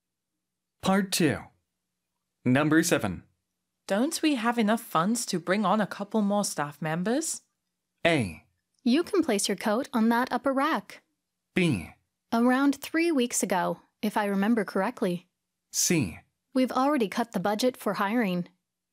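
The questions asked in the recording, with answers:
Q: Don't we have enough funds to bring on a couple more staff members?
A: C: We've already cut the budget for hiring.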